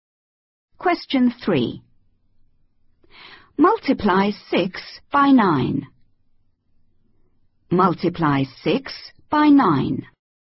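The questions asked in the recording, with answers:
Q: Multiply 6 by 9.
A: 54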